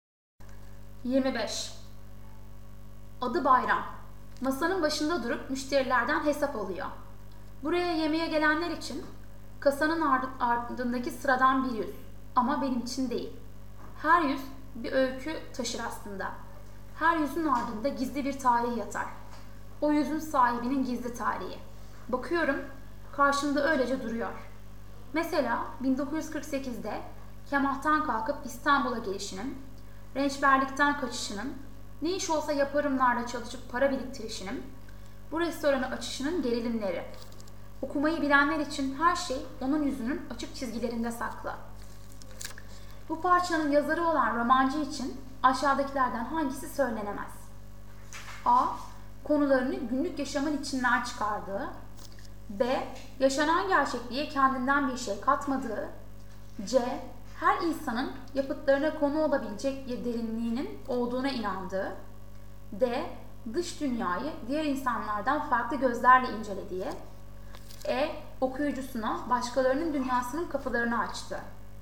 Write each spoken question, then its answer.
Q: Bu parçanın yazarı olan romancı için aşağıdakilerden hangisi söylenemez?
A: Doğru yanıt B.